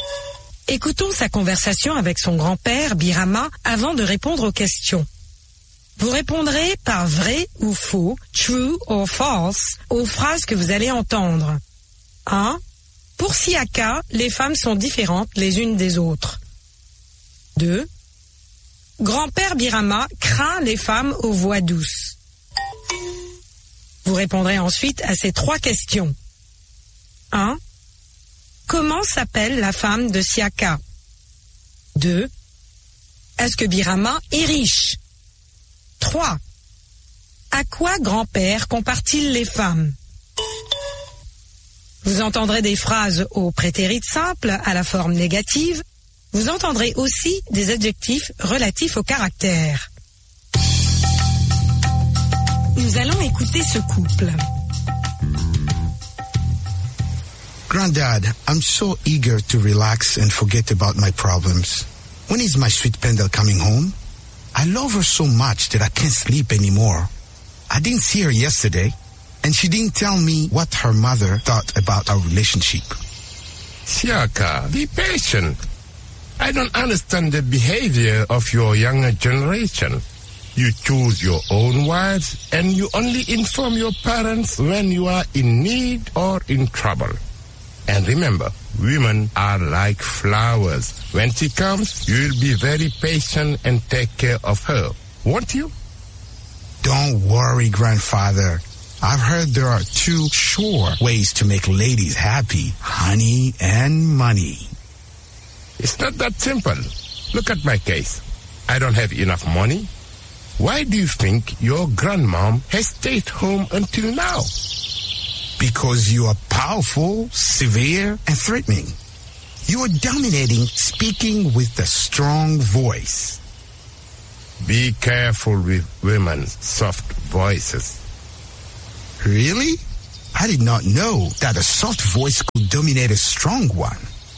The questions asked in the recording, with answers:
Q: Pour Siaka, les femmes sont différentes les unes des autres.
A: l'énoncé 1 est faux.

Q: Grand-père Birama craint les femmes aux voix douces.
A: L'énoncé 2 est vrai.

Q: Comment s'appelle la femme de Siaka?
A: La femme de Siaka s'appelle Pendel.

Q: Est-ce que Birama est riche?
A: Non, Birama n'est pas riche, mais patient.

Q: À quoi grand-père compare-t-il les femmes?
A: Grand-père compare les femmes aux fleurs.